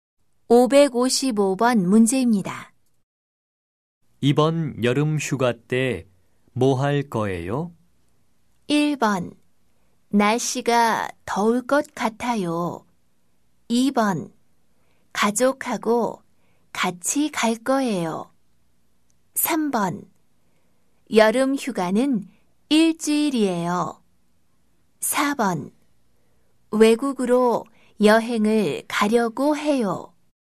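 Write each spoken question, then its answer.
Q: 이번 여름 휴가 때 뭐 할 거예요?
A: 4: 외국으로 여행을 가려고 해요.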